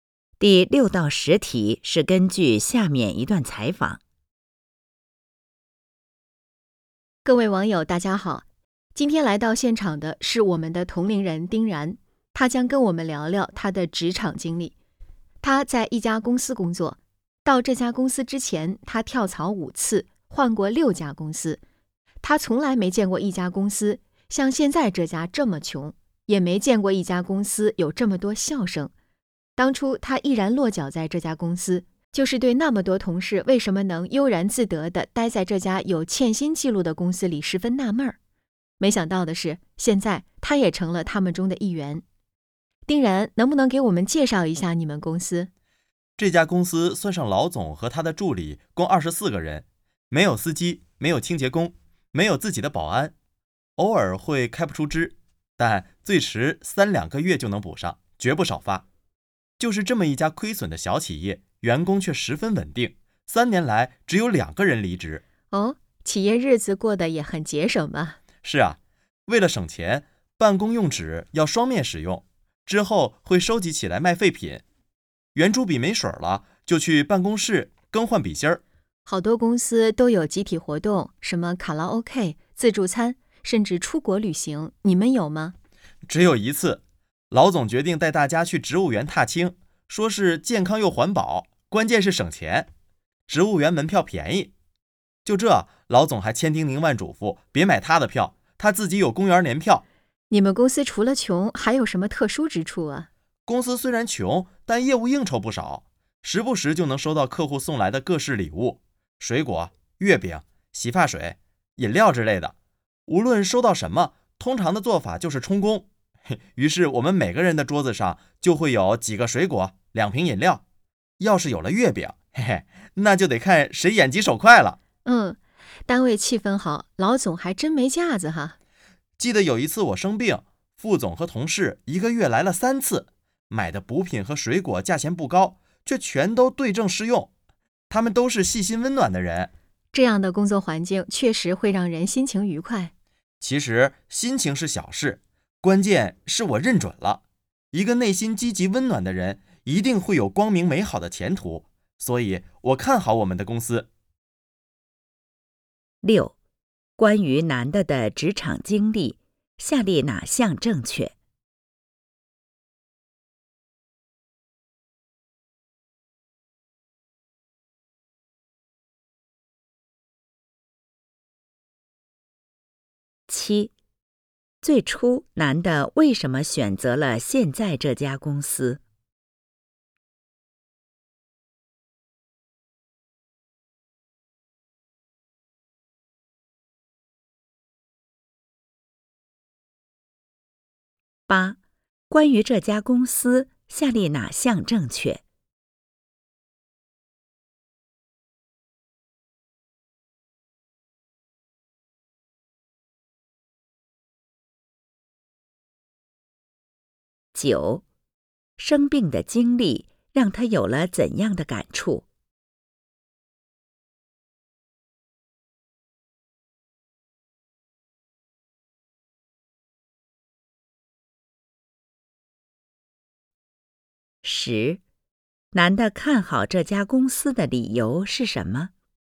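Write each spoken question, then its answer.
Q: 最初男的为什么选择了现在这家公司?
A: 他很纳闷,为什么那么多同事能悠然自得地待在这家有欠薪记录的公司里

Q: 生病的经历让他有了怎样的感触?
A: 同事们都是细心温暖的人

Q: 男的看好这家公司的理由是什么?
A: 内心积极温暖的人一定会有光明美好的前途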